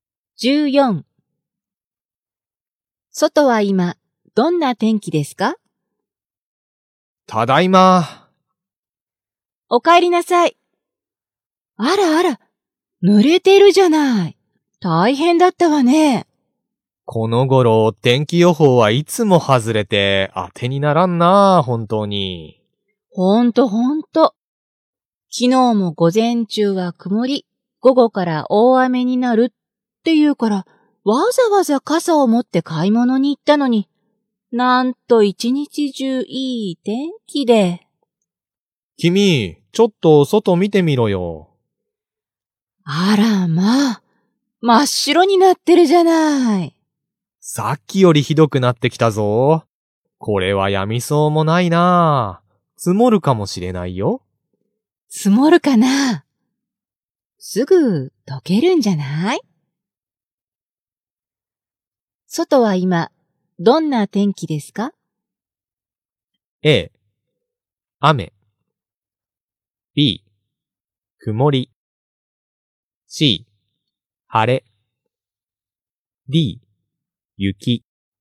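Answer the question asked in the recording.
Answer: D: 雪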